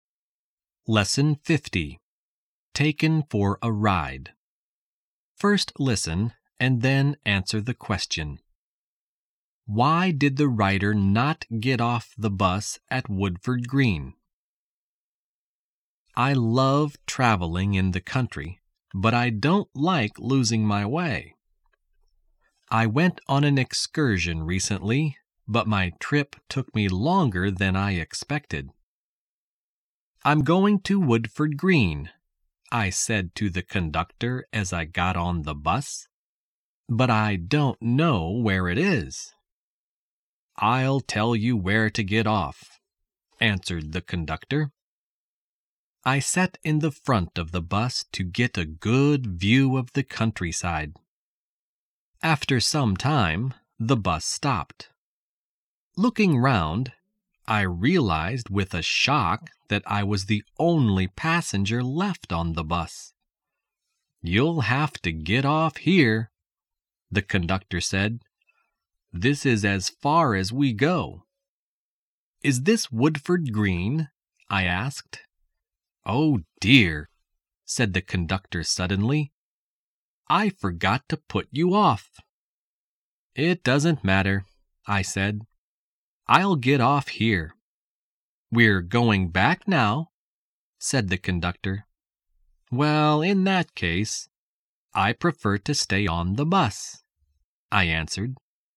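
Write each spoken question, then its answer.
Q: Why did the writer not get off the bus at Woodford Green?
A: The conductor forgot to tell him where to get off.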